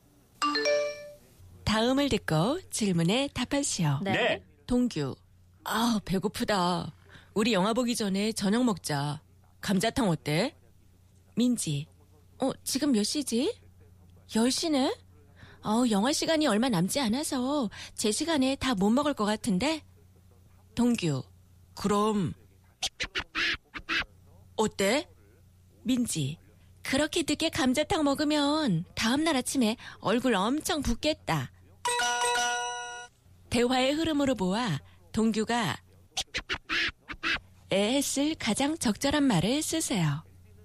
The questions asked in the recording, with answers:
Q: 대화의 흐름으로 보아 동규가 에 했을 가장 적절한 말을 쓰세요.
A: 우리 영화 본 다음에 밥 먹자.